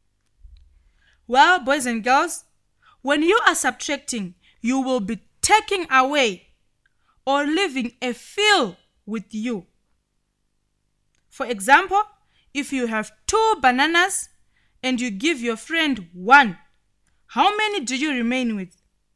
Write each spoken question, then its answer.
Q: For example, if you have 2 bananas and you give your friend 1, how many do you remain with?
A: If you said you remain with 1, you are correct.